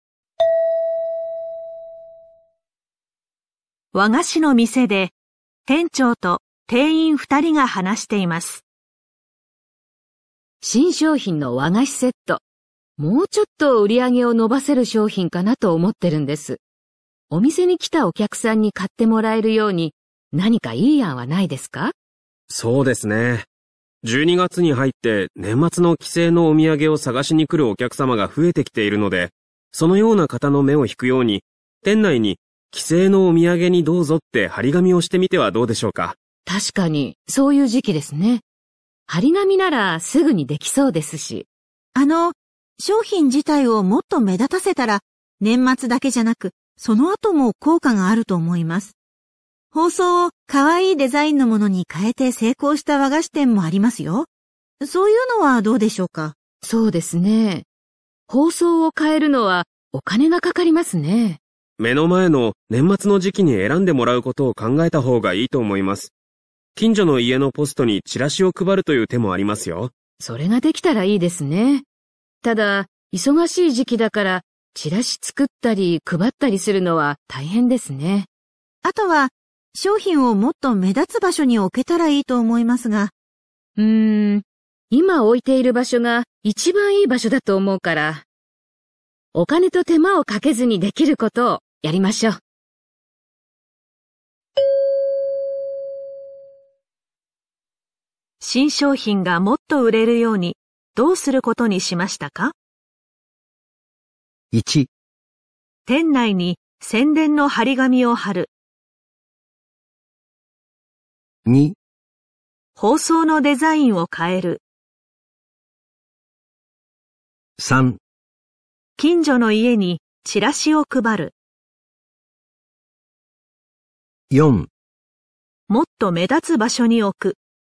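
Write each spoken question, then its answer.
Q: 新商品がもっと売れるようにどうすることにしましたか?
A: 1: 店内に宣伝の張り紙を貼る。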